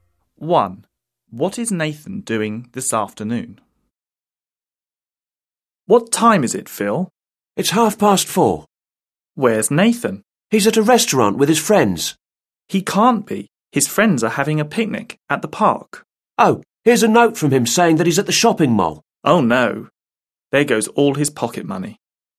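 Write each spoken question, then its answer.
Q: What is Nathan doing this afternoon?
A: He's at the shopping mall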